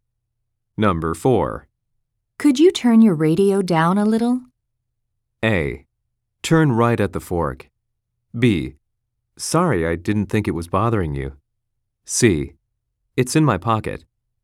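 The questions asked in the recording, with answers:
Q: Could you turn your radio down a little?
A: B: Sorry, I didn't think it was bothering you.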